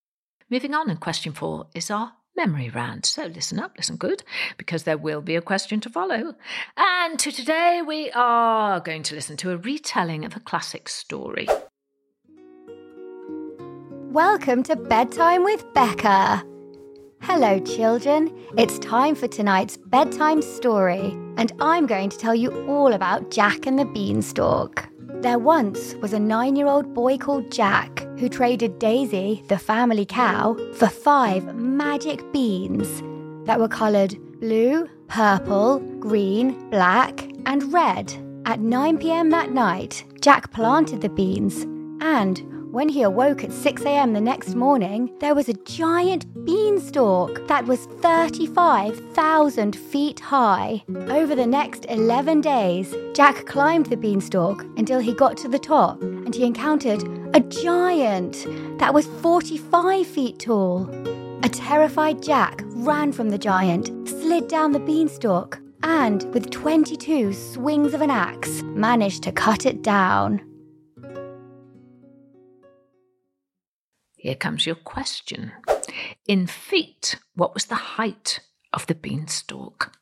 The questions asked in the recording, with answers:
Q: In feet, what was the height of the beanstalk?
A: And the answer was 35,000 feet.